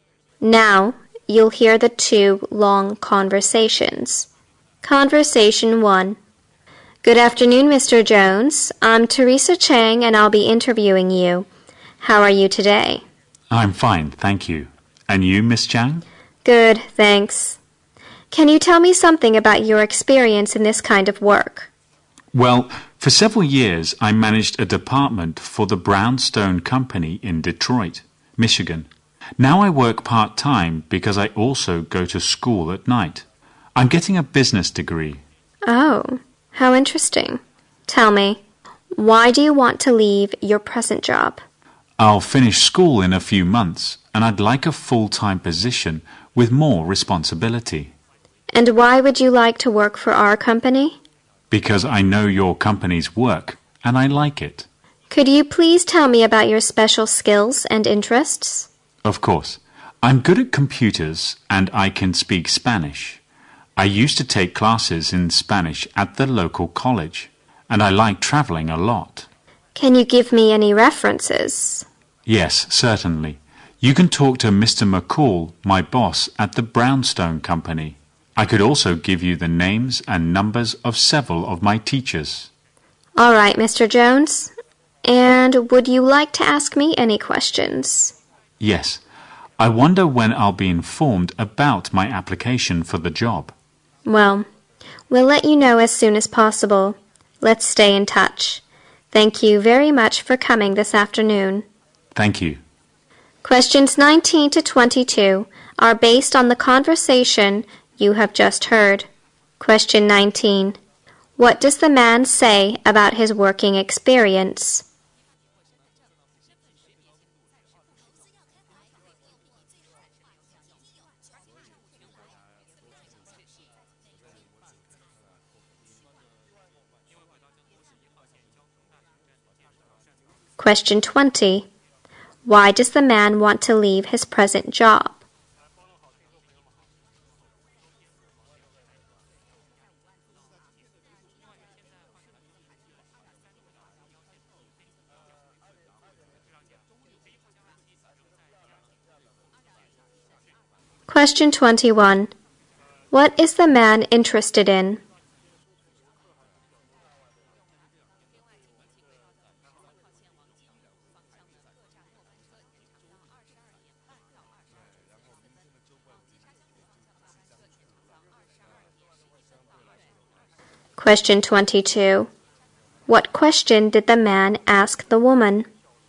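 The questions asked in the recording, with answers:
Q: What does the man say about his working experience?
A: He managed a department at the Brownstone Company in Detroit for several years.

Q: Why does the man want to leave his present job?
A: He wants a full-time job with more responsibility.

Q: What is the man interested in?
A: Computers, Spanish and traveling

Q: What question did the man ask the woman?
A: When he would hear about his job application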